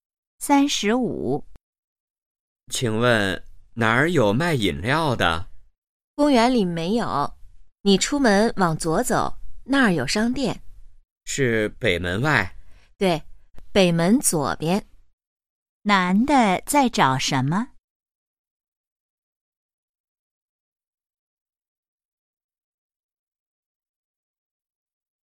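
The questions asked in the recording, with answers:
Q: 男的在找什么?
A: 卖饮料的地方(商店)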